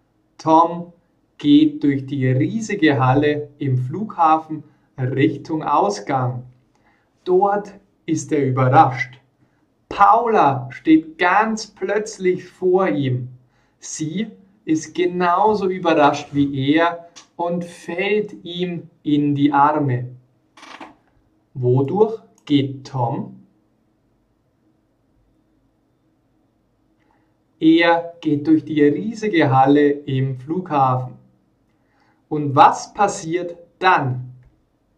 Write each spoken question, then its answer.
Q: Und was passiert dann?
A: Paula steht plötzlich vor ihm.